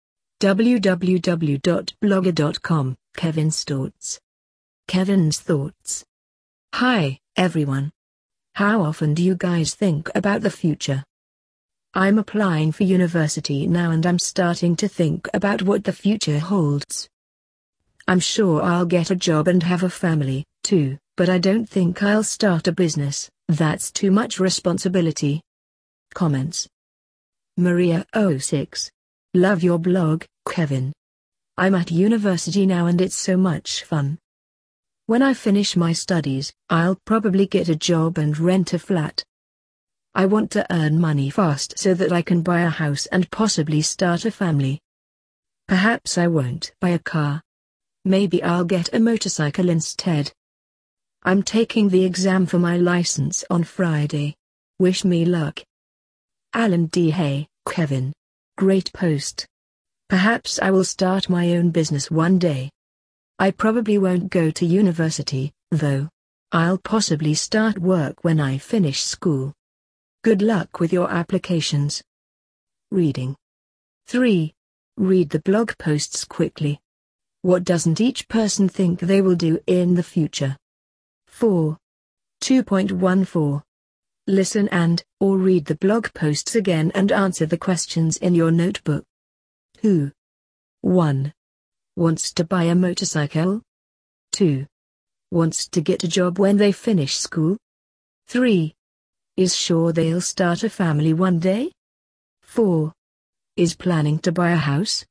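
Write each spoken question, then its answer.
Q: Wants to buy a motorcycle?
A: Maria

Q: Wants to get a job when they finish school?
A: Alan

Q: Is sure they'll start a family one day?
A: Kevin

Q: Is planning to buy a house?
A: Maria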